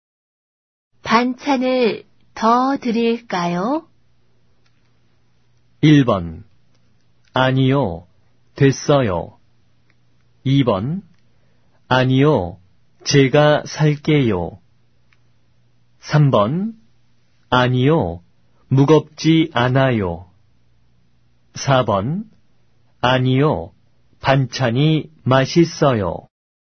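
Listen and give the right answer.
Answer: 1: 아니요, 됐어요.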